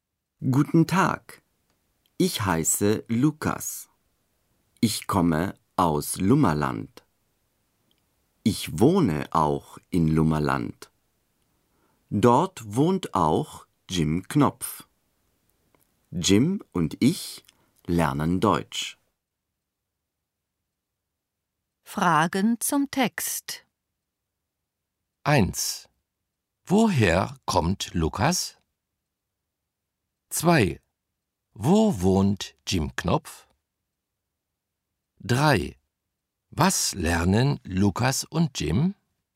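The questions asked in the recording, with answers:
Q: Woher kommt Lukas?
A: Aus Lummerland

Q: Wo wohnt Jim Knopf?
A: In Lummerland

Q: Was lernen Lukas und Jim?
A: Deutsch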